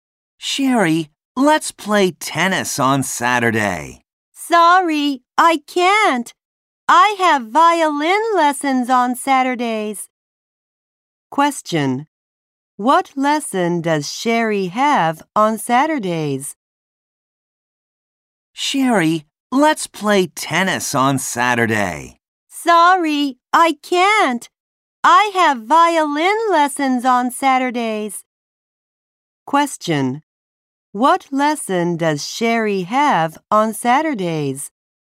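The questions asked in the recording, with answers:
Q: What lesson does Sherry have on Saturdays?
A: Violin lessons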